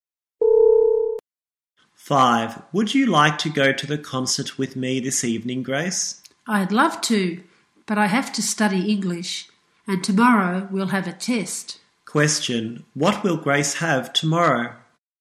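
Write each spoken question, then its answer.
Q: What will Grace have tomorrow?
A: An English test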